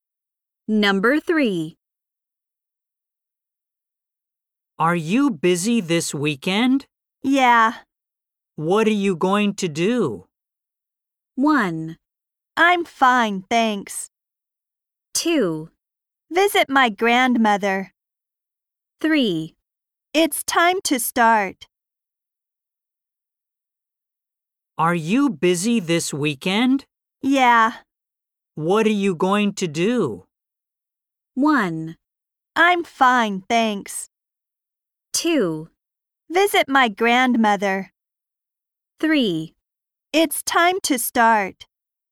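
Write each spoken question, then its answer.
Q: What are you going to do?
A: 2: Visit my grandmother.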